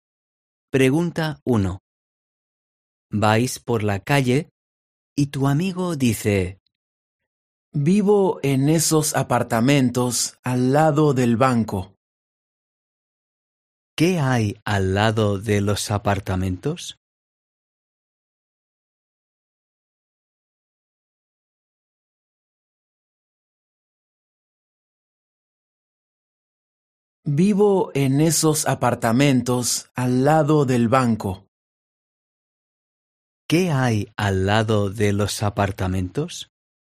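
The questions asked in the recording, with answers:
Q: ¿Qué hay al lado de los apartamentos?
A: el banco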